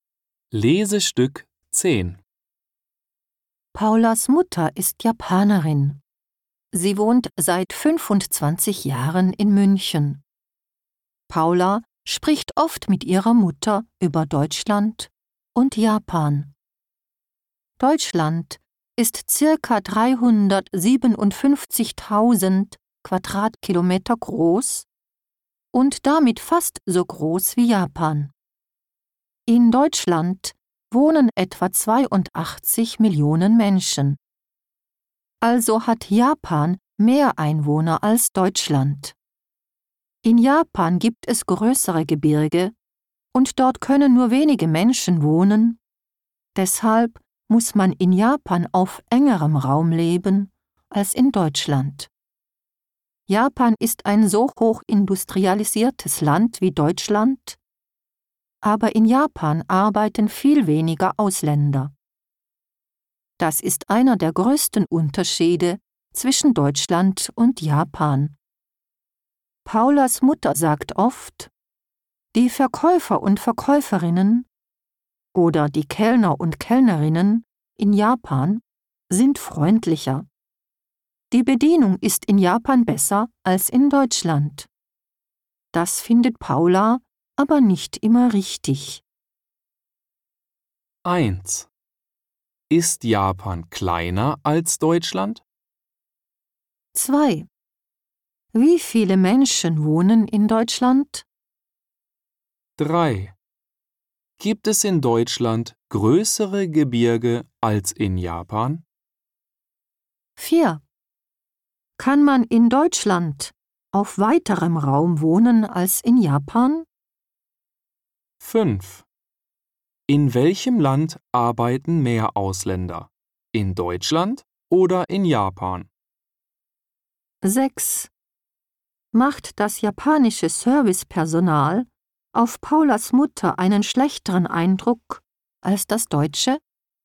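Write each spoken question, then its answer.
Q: Ist Japan kleiner als Deutschland?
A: Nein, Japan ist etwas größer als Deutschland.

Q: Wie viele Menschen wohnen in Deutschland?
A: Etwa 82 Millionen.

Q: Gibt es in Deutschland größere Gebirge als in Japan?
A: Nein, in Japan gibt es größere Gebirge.

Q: Kann man in Deutschland auf weiterem Raum wohnen als in Japan?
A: Ja.

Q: In welchem Land arbeiten mehr Ausländer? In Deutschland oder in Japan?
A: In Deutschland.

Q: Macht das japanische Servicepersonal auf Paulas Mutter einen schlechteren Eindruck als das deutsche?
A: Nein, sie findet es freundlicher und besser.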